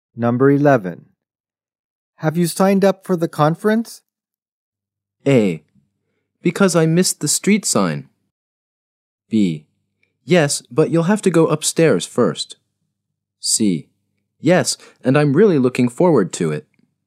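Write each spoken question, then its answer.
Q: Have you signed up for the conference?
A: C: Yes, and I'm really looking forward to it.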